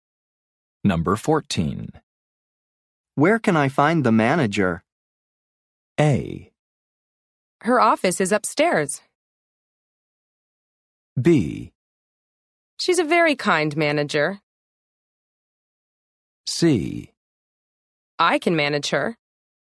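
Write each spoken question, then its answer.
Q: Where can I find the manager?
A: A: Her office is upstairs.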